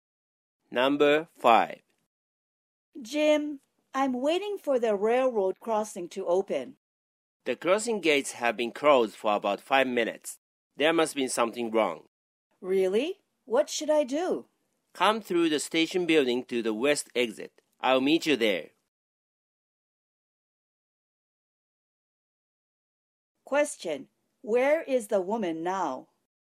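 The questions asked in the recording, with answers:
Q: Where is the woman now?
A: at the railroad crossing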